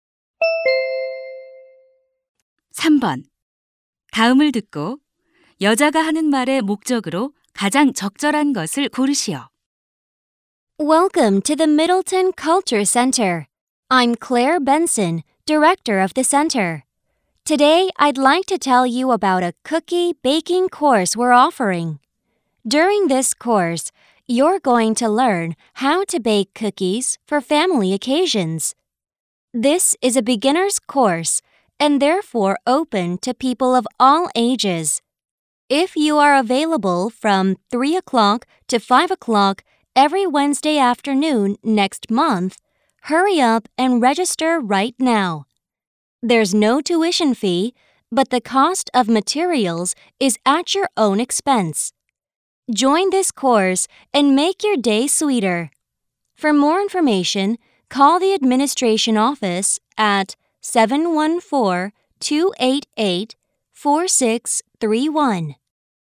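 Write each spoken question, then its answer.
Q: 다음을 듣고 여자가 하는 말의 목적으로 가장 적절한 것을 고르시오.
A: 쿠키 굽기 강좌를 홍보하고 등록을 권하려고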